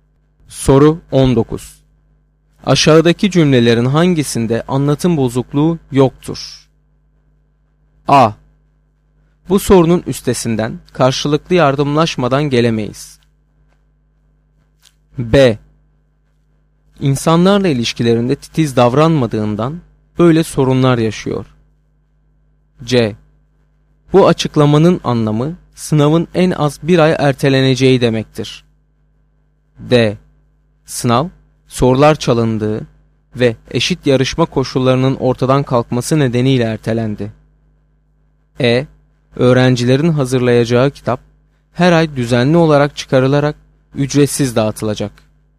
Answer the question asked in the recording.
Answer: Doğru cevap B şıkkı.